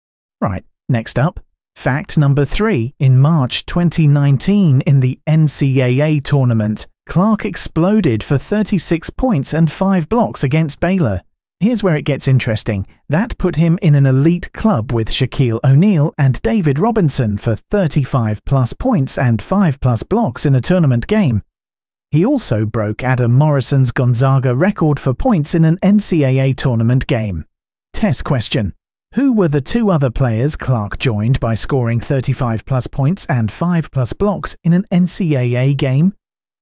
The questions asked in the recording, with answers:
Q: Who were the two other players Clark joined by scoring 35-plus points and 5-plus blocks in an NCAA game?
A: Correct answer. Shaquille O'Neal and David Robinson.